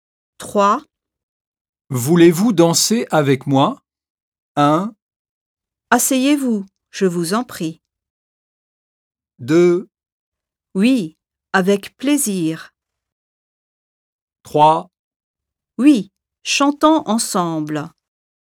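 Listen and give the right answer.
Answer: 2: Oui. Avec plaisir.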